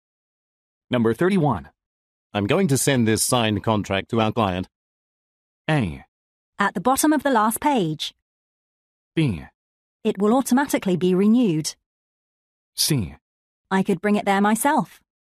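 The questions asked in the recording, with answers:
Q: I'm going to send this signed contract to our client.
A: C: I could bring it there myself.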